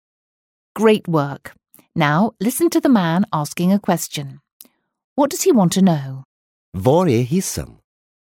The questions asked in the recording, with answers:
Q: What does he want to know?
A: the man was wondering where the lift is